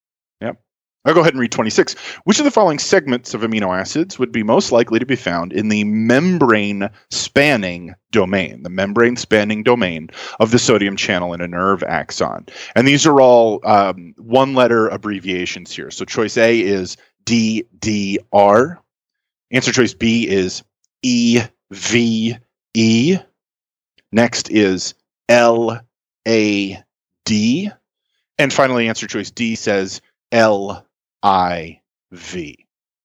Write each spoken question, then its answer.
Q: Which of the following segments of amino acids would be most likely to be found in the membrane-spanning domain, the membrane-spanning domain of the sodium channel in a nerve axon?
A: that's going to be LIV.